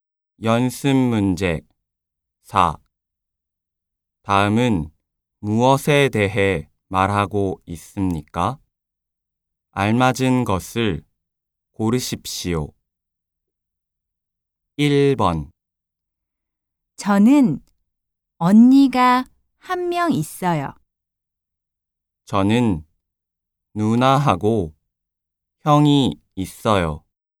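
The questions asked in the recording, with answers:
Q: 다음은 무엇에 대해 말하고 있습니까?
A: 가족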